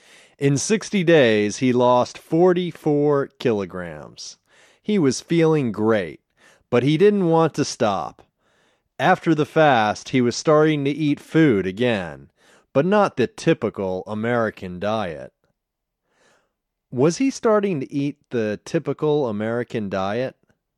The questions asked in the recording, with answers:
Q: Was he starting to eat the typical American diet?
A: No, he wasn't starting to eat the typical American diet.